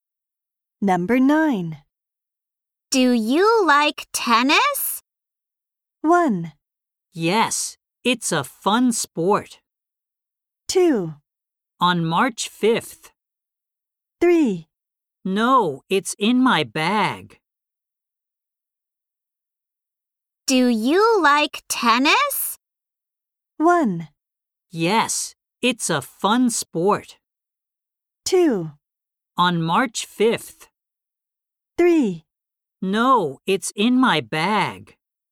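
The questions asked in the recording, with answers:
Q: Do you like tennis?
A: 1: Yes, it's a fun sport.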